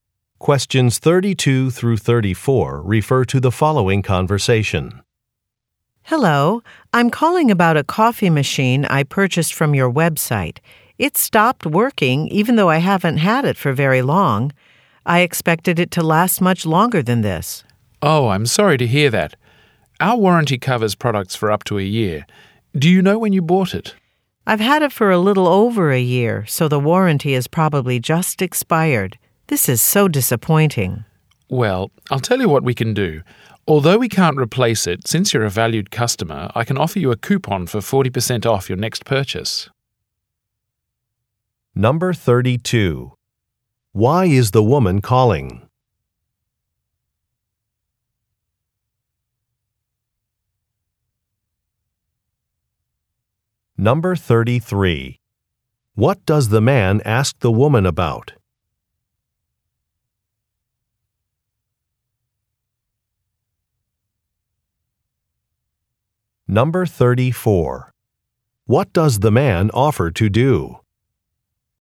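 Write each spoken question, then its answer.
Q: Why is the woman calling?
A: Her coffee machine stopped working

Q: What does the man ask the woman about?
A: When she bought the coffee machine

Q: What does the man offer to do?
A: Give her a coupon for 40% off her next purchase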